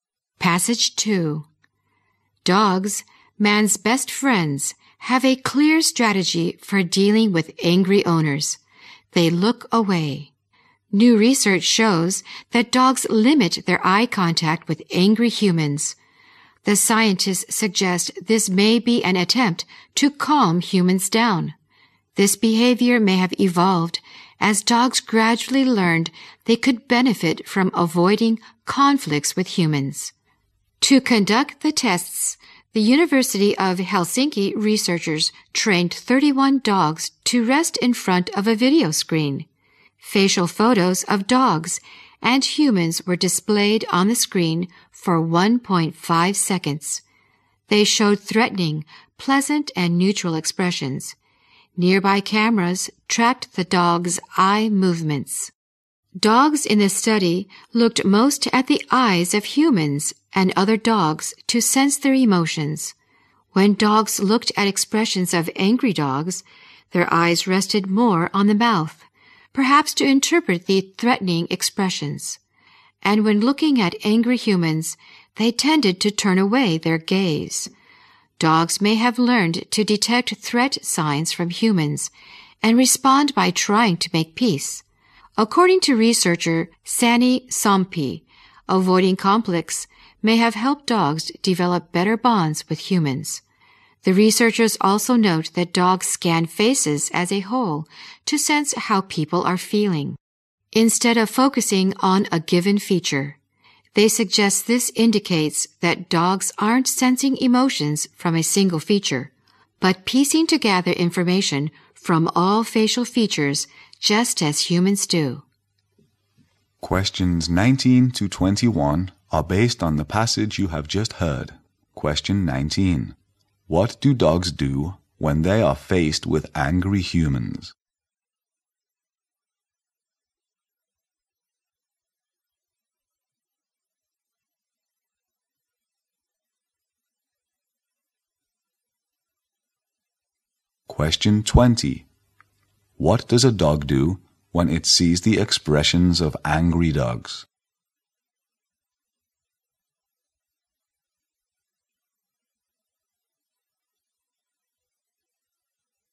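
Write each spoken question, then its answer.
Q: What do dogs do when they are faced with angry humans?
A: They look away and avoid eye contact

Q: What does a dog do when it sees the expressions of angry dogs?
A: Its eyes rest more on the mouth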